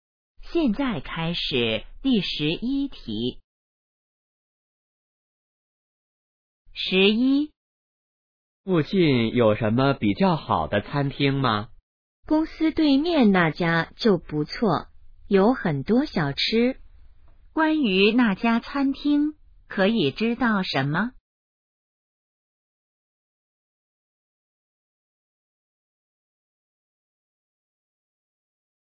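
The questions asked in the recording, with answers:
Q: 关于那家餐厅,可以知道什么?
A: 在公司对面,有很多小吃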